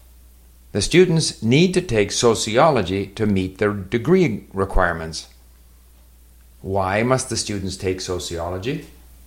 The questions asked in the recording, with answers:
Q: Why must the students take sociology?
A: The students have to take sociology to meet the degree requirements.